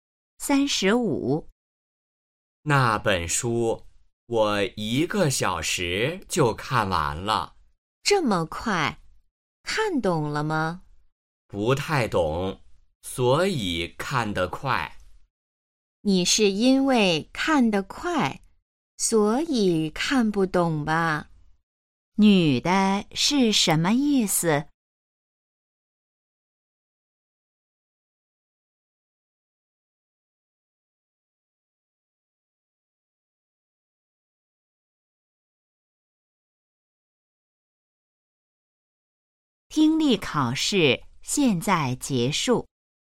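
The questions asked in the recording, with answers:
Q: 女的是什么意思?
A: 男的看得太快,所以没看懂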